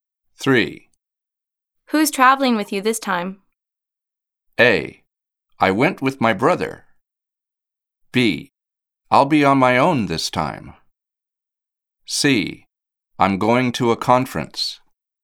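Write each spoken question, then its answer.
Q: Who's traveling with you this time?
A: B: I'll be on my own this time.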